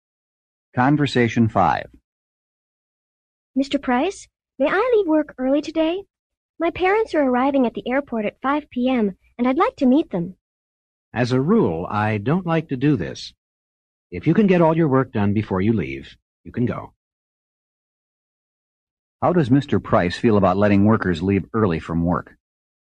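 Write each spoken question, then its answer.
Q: How does Mr. Price feel about letting workers leave early from work?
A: As a rule he doesn't like it, but allows it if work is done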